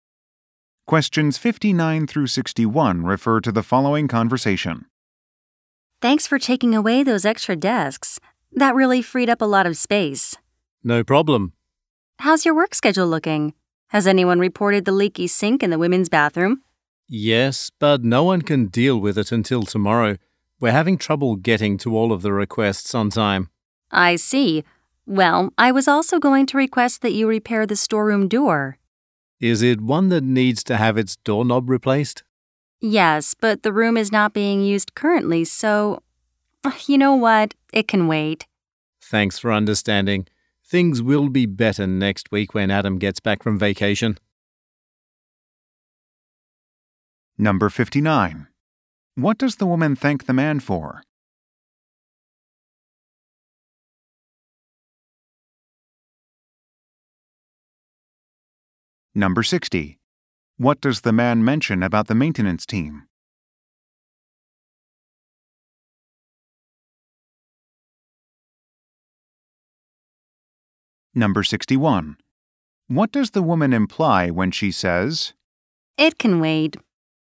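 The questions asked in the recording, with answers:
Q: What does the woman thank the man for?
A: Taking away the extra desks

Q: What does the man mention about the maintenance team?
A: They're having trouble handling requests on time

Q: What does the woman imply when she says,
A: The door repair is not urgent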